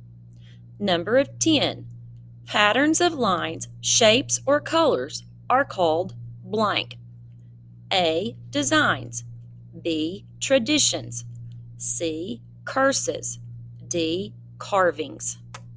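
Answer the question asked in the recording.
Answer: A: Designs.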